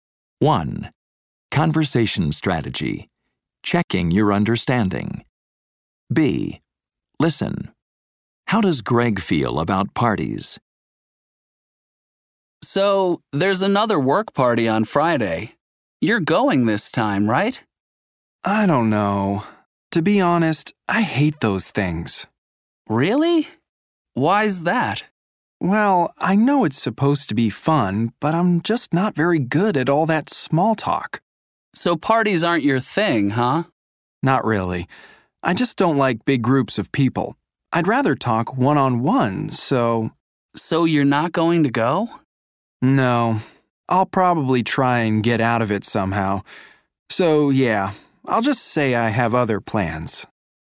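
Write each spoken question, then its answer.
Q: How does Greg feel about parties?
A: He hates them; he's not good at small talk and doesn't like big groups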